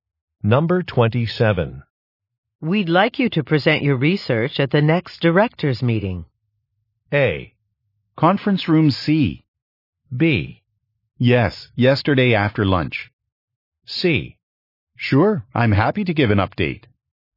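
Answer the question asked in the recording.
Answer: C: Sure, I'm happy to give an update.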